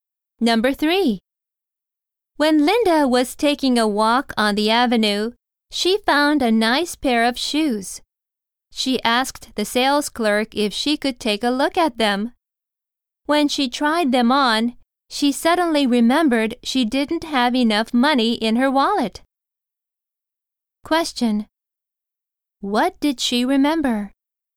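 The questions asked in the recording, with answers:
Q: What did she remember?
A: She didn't have enough money in her wallet.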